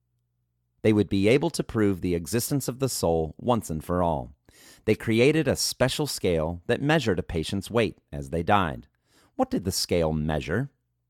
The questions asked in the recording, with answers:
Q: What did the scale measure?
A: The scale measured a patient's weight as they died.